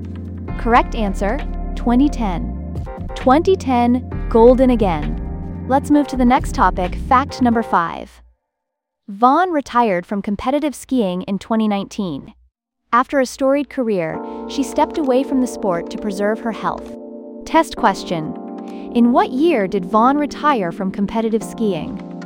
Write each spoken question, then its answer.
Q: in what year did Vonn retire from competitive skiing?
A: 2019.